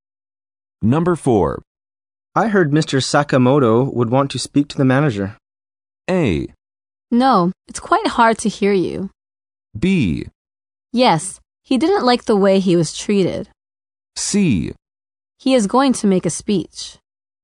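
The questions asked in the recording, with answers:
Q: I heard Mr. Sakamoto would want to speak to the manager.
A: B: Yes, he didn't like the way he was treated.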